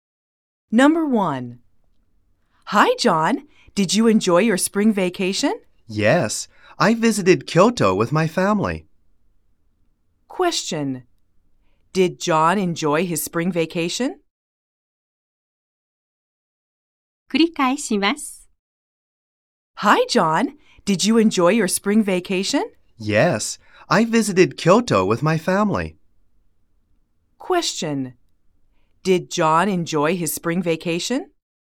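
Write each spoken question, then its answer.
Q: Did John enjoy his spring vacation?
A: Yes, he did.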